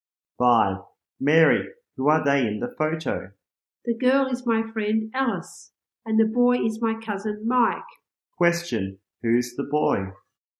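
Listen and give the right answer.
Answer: Her cousin Mike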